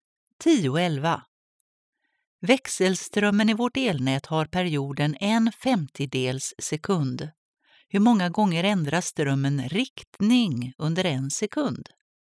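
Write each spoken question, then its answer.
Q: Hur många gånger ändras strömmen riktning under en sekund?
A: 100 gånger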